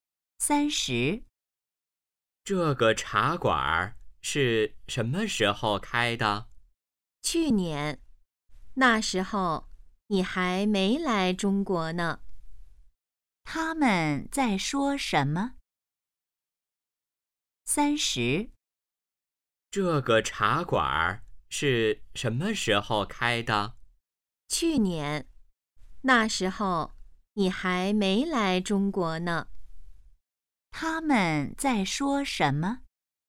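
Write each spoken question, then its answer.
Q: 他们在说什么?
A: 茶馆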